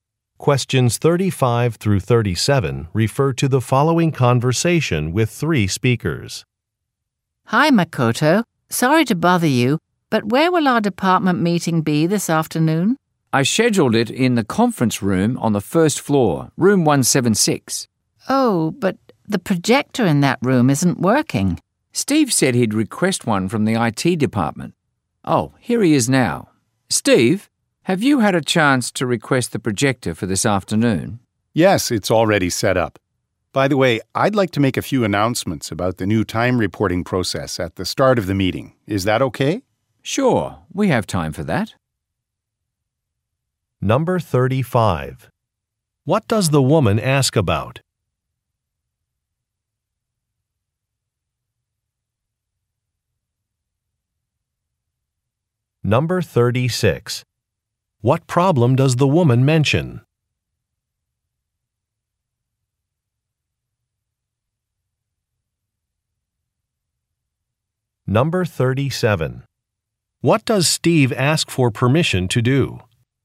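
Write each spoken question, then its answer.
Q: What does the woman ask about?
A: Where the department meeting will be

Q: What problem does the woman mention?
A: The projector in the room isn't working

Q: What does Steve ask for permission to do?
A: Make announcements about the new time reporting process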